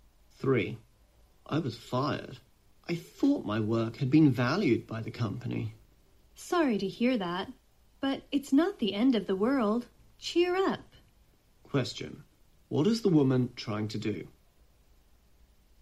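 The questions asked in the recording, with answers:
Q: What is the woman trying to do?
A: Comfort the man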